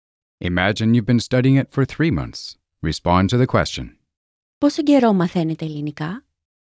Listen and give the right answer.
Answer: Για 3 μήνες.